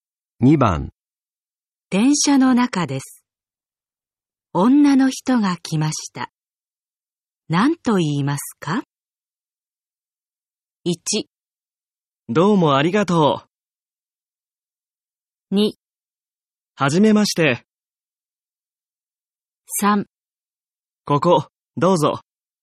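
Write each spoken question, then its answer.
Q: 電車の中です。女の人が来ました。何と言いますか?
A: 3: ここ、どうぞ。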